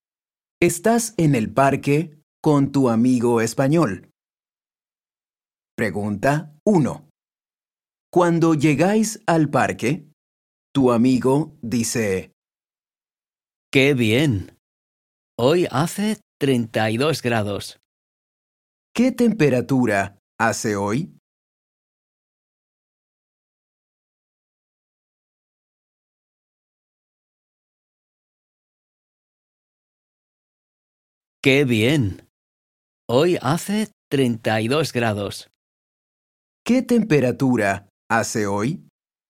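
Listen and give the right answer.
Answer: 32 grados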